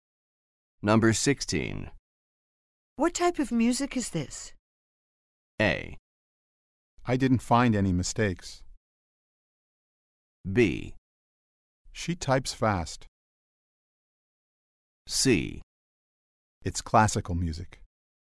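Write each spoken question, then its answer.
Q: What type of music is this?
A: C: It's classical music.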